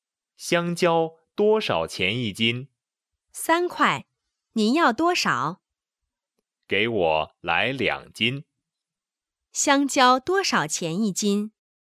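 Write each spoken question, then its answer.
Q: 香蕉多少钱一斤?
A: 三块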